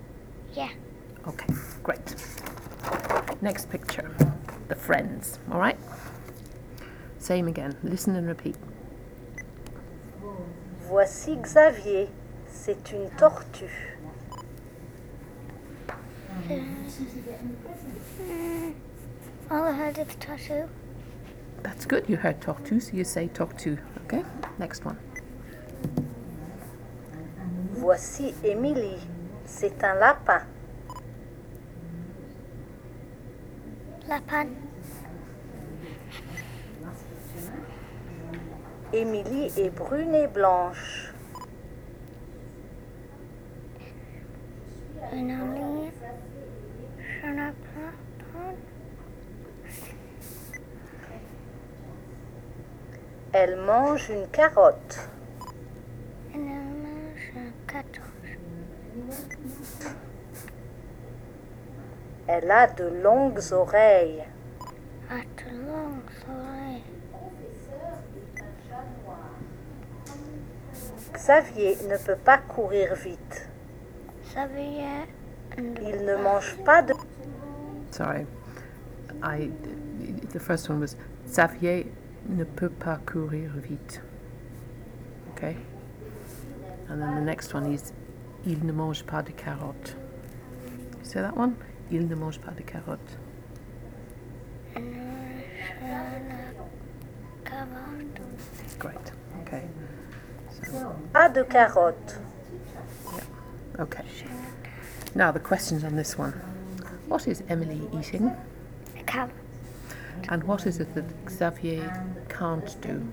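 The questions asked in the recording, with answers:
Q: What is Emily eating?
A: A carrot

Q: And what is it that Xavier can't do?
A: Run fast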